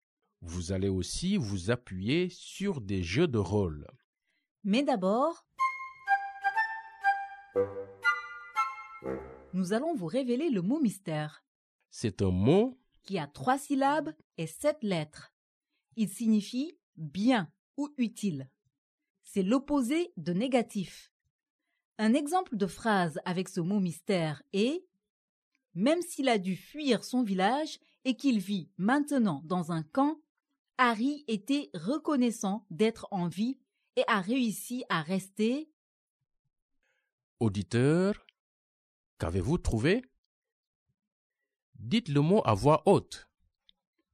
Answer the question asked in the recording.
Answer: Le mot mystère d'aujourd'hui est « positif ».